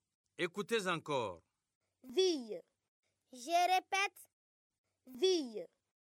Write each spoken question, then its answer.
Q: Ville.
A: Cheville.